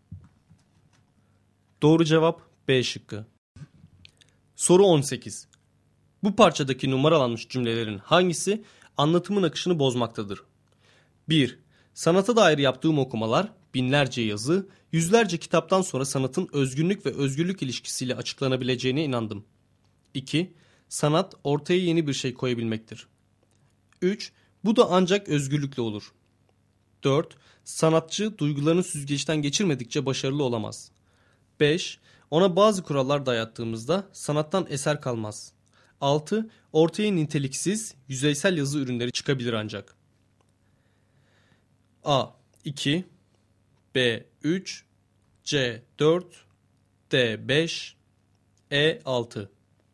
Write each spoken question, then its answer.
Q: Bu parçadaki numaralanmış cümlelerin hangisi anlatımın akışını bozmaktadır?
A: Doğru cevap C şıkkı.